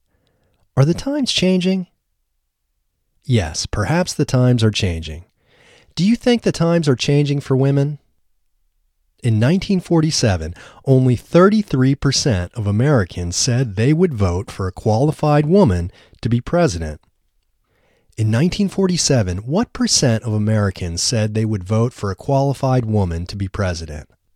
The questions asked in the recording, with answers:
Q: In 1947, what percent of Americans said they would vote for a qualified woman to be president?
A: In 1947, only 33% of Americans said they would vote for a qualified woman to be president.